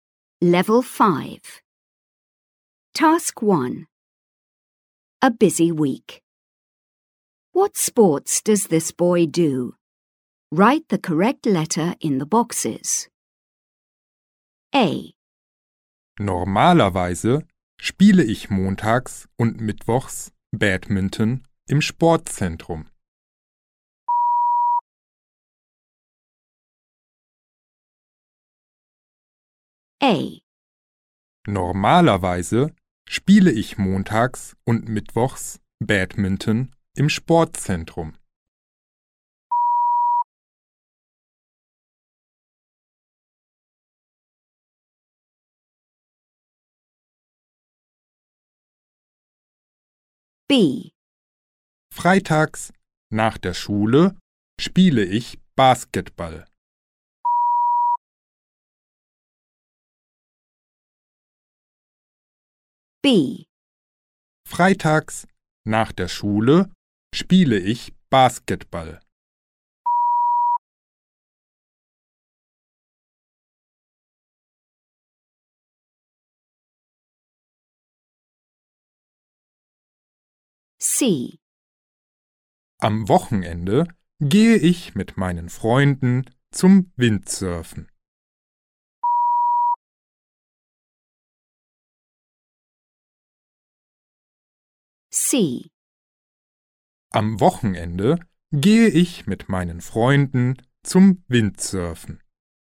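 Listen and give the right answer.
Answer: Badminton, basketball and windsurfing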